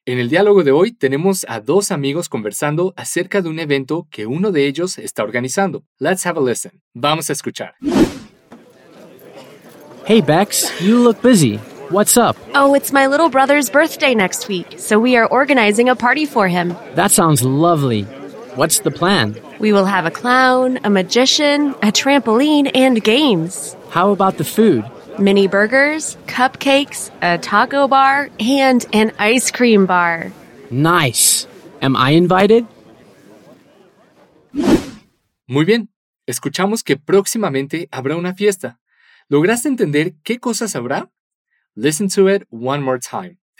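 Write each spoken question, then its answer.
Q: ¿Lograste entender qué cosas habrá?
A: Un payaso, un mago, un trampolín y juegos; y de comida: mini hamburguesas, cupcakes, una barra de tacos y una barra de helados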